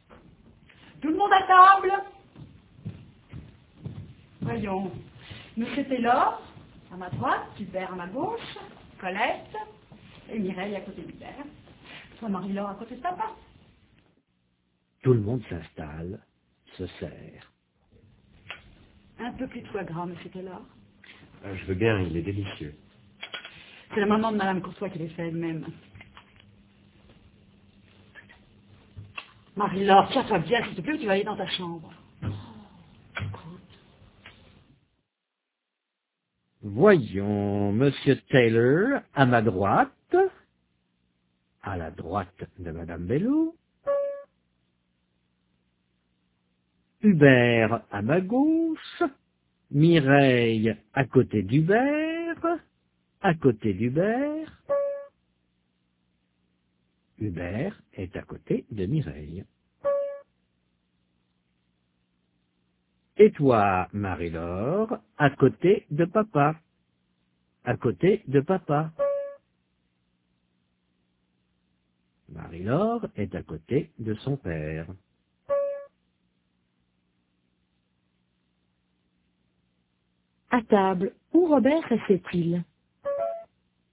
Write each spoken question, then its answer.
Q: À table, où Robert restait-il?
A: À la droite de madame Bello.